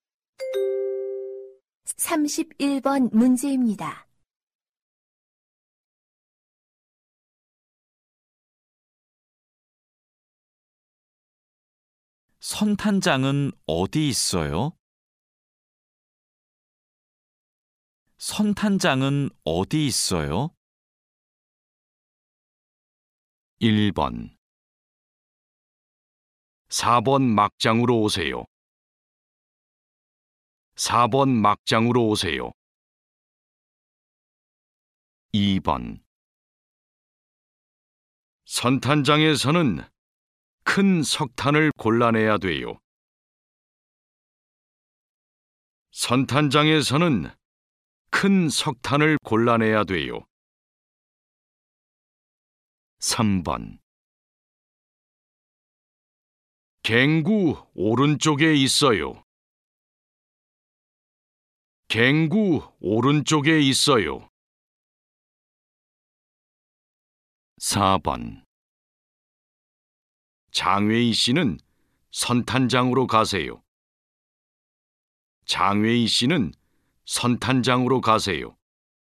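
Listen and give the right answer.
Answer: 3: 갱구 오른쪽에 있어요.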